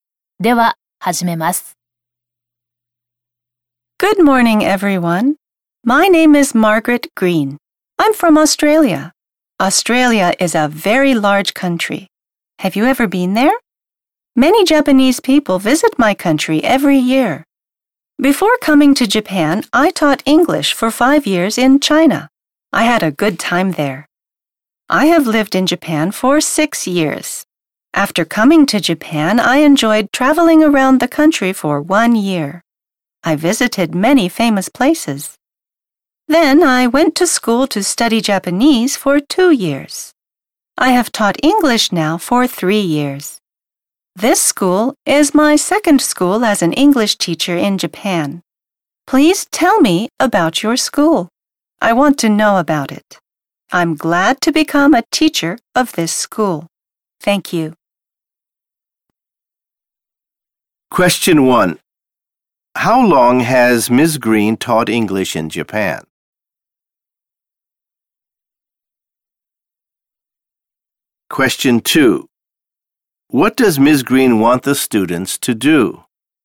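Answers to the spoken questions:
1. For 3 years
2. She wants them to tell her about their school.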